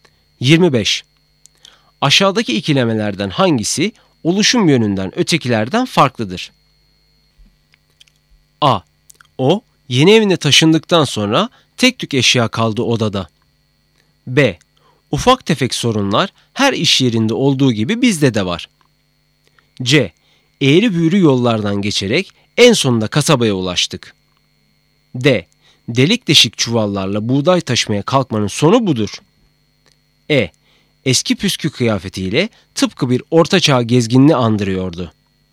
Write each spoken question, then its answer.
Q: Aşağıdaki ikilemelerden hangisi oluşum yönünden ötekilerden farklıdır?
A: Doğru cevap D.